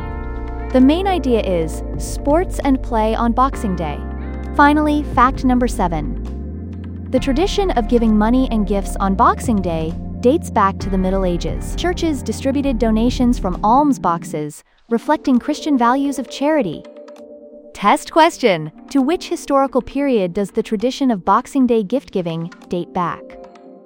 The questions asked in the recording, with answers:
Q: To which historical period does the tradition of Boxing Day gift giving date back?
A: Correct answer. Middle Ages.